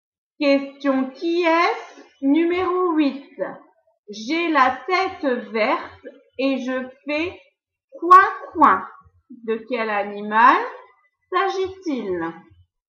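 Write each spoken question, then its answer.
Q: De quel animal s'agit-il?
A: le canard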